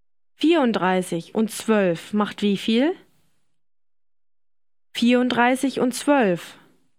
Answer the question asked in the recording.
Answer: 46.